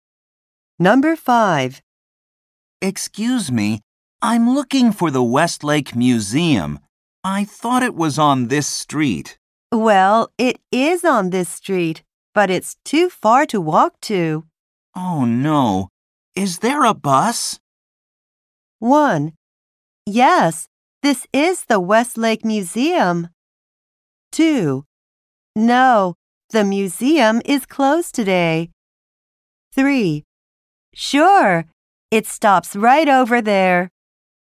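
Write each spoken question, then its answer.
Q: Oh no, is there a bus?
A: 3: Sure. It stops right over there.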